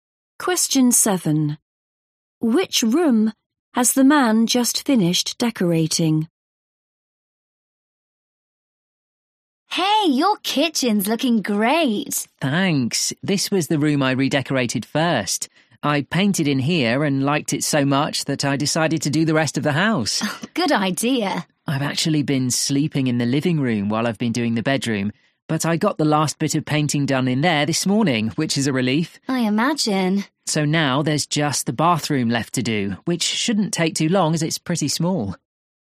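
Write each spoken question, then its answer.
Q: Which room has the man just finished decorating?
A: The bedroom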